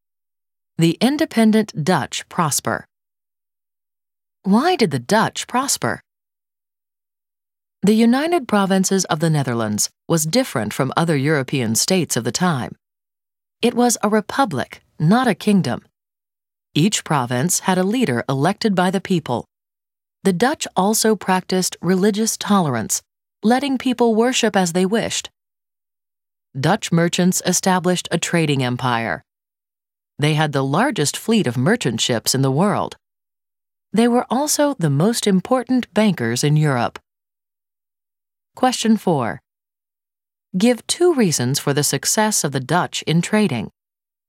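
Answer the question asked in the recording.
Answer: Largest merchant fleet in the world and most important bankers in Europe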